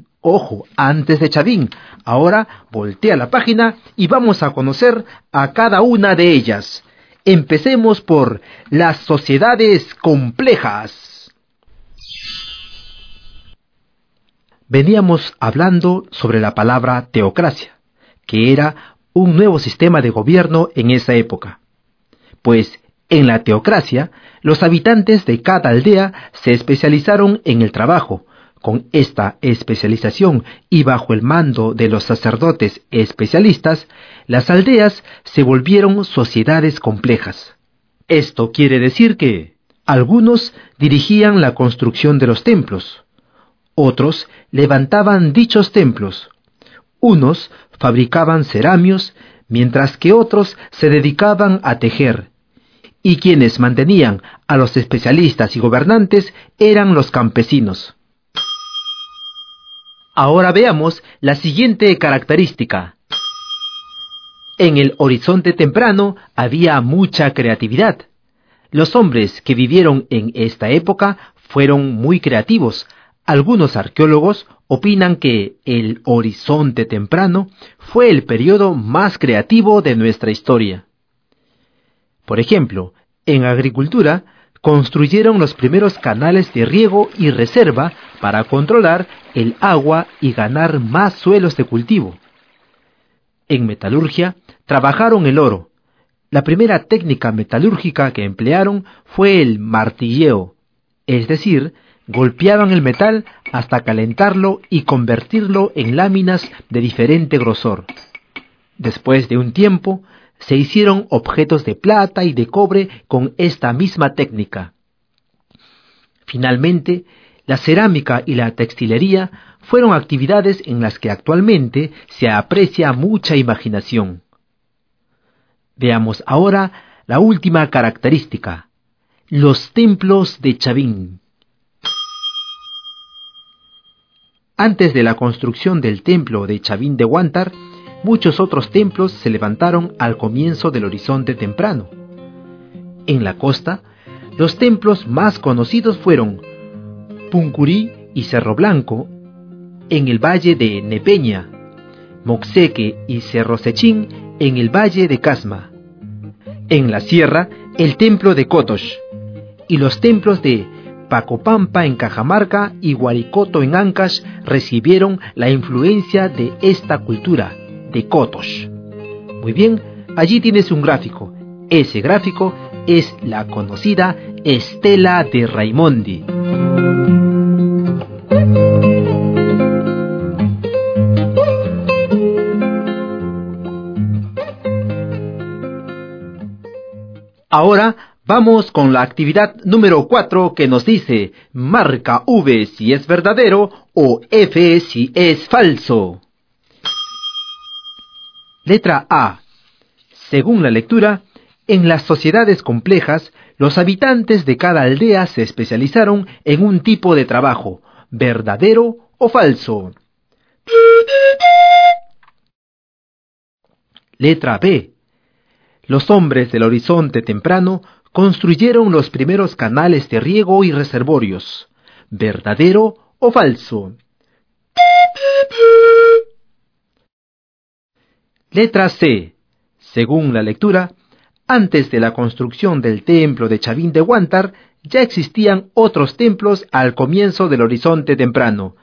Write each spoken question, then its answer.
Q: Letra C. Según la lectura, antes de la construcción del templo de Chavín de Huántar, ya existían otros templos al comienzo del horizonte temprano.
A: Esto es verdadero.